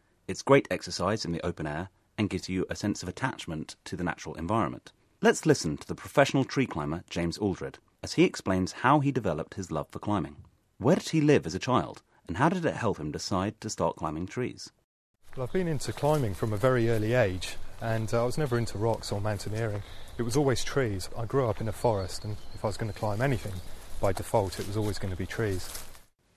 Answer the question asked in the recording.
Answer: OK, so James grew up in a forest.